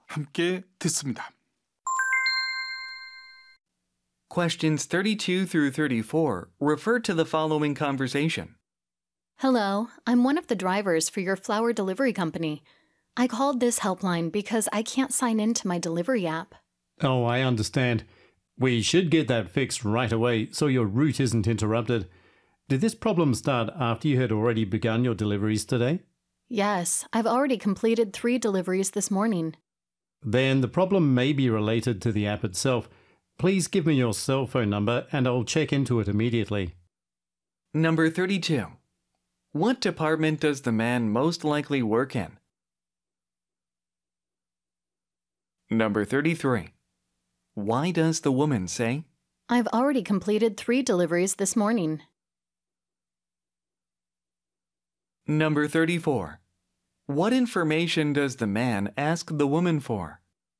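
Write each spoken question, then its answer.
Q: What information does the man ask the woman for?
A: Her cell phone number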